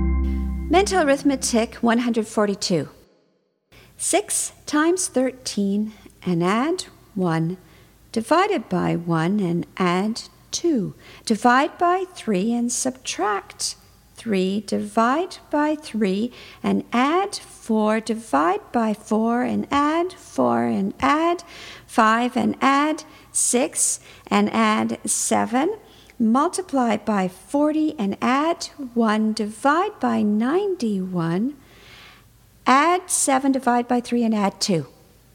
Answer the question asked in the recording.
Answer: And the answer is 8.